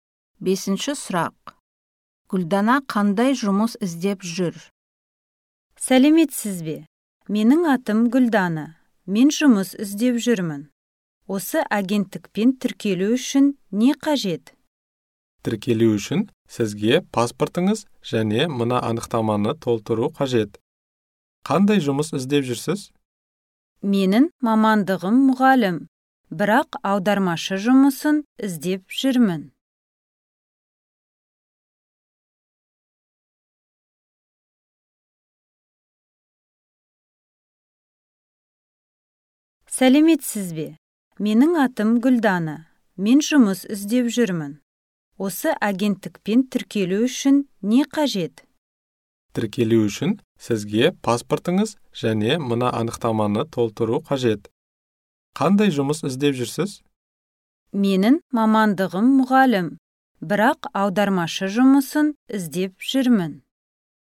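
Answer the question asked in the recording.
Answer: Аудармашы жұмысы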